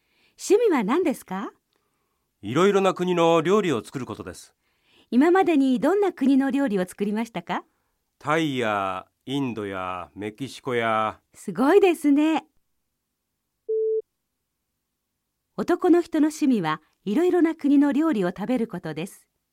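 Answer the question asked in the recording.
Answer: ×(いろいろな国の料理を作ることです)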